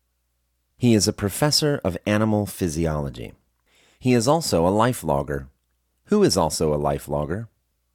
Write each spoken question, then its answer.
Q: Who is also a life logger?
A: Morris is also a life logger.